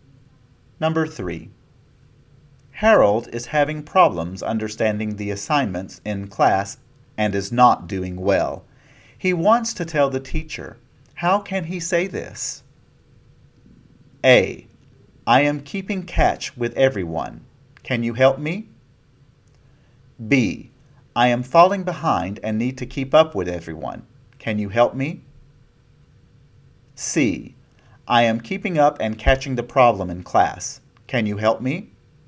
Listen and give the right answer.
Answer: The answer is B. I am falling behind and need to keep up with everyone.